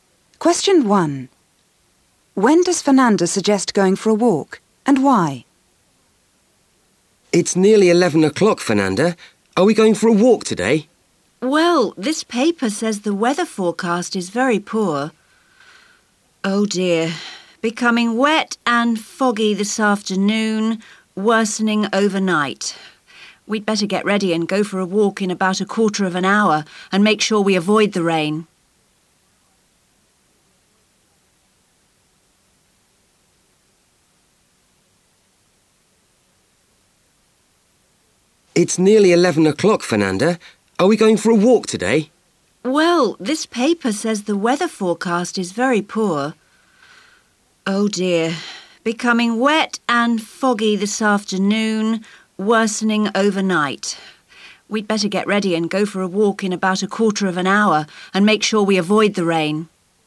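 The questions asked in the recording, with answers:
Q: When does Fernanda suggest going for a walk, and why?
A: In about a quarter of an hour, to avoid the rain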